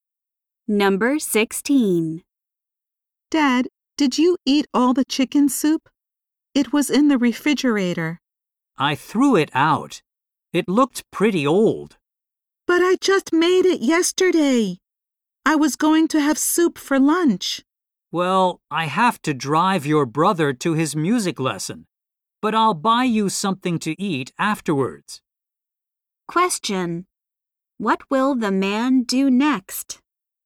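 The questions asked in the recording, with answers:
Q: What will the man do next?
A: Drive his son to his music lesson.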